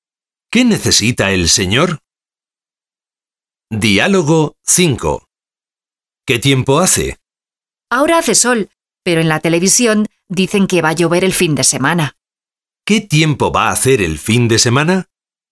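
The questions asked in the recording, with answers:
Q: ¿Qué tiempo va a hacer el fin de semana?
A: Va a llover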